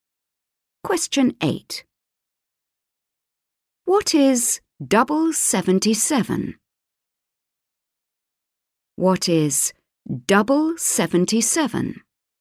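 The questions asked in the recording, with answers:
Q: What is double 77?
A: 154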